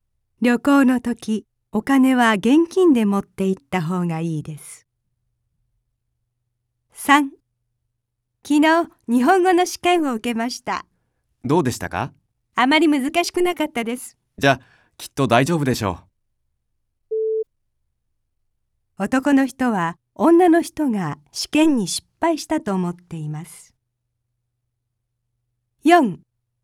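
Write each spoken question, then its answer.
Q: 男の人は女の人が試験に失敗したと思っています。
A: ×(正しくない)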